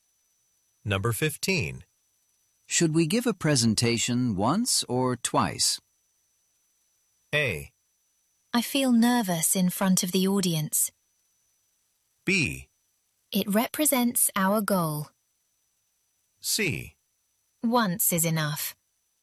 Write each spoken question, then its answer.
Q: Should we give a presentation once or twice?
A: Once is enough.